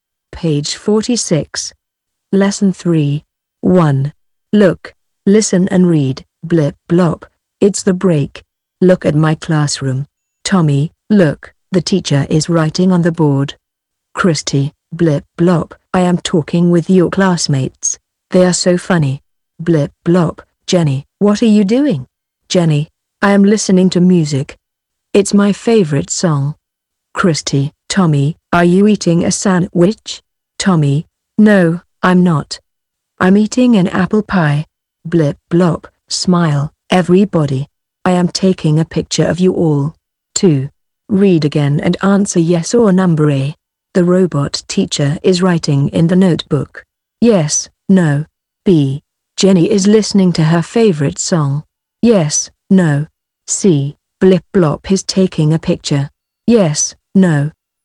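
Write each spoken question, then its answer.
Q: The robot teacher is writing in the notebook.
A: No

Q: Jenny is listening to her favorite song.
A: Yes

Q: Blip blop is taking a picture.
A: Yes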